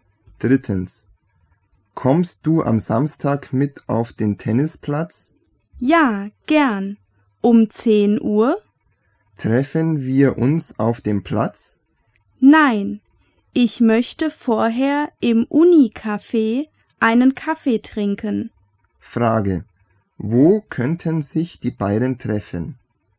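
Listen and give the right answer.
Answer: Im Uni-Café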